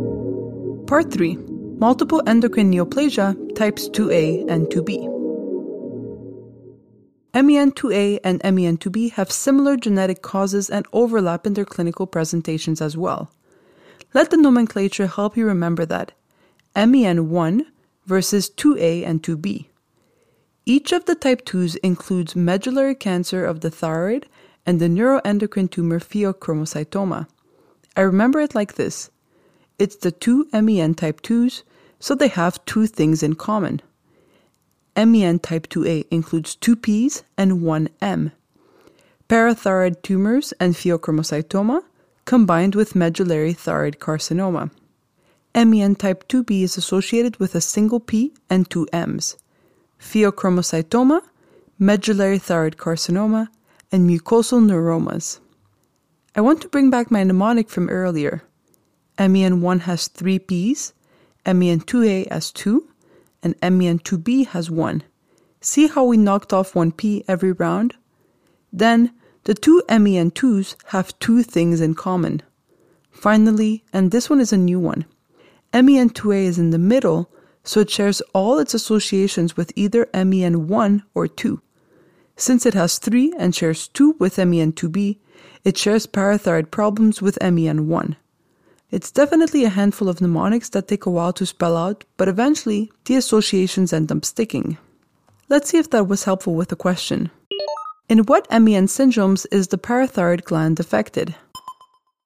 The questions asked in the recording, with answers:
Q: In what MEN syndromes is the parathyroid gland affected?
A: Parathyroid adenomas and hyperplasia occur in MEN1 and MEN2A.